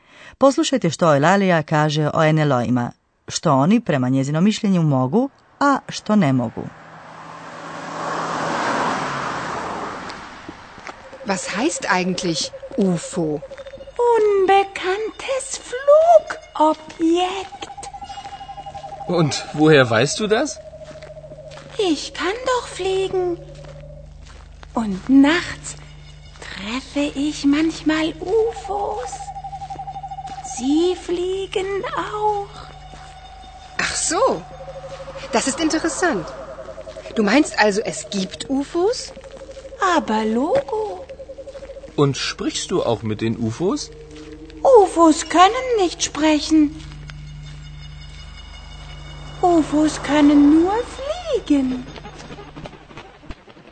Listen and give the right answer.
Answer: NLO i ne mogu govoriti. Sprechen.